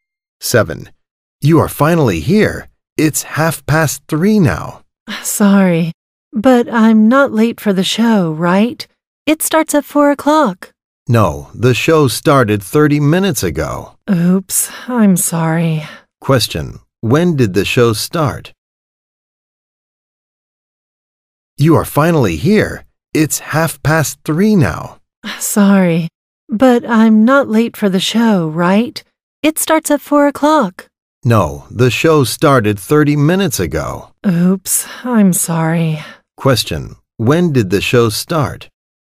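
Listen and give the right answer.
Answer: At 3:00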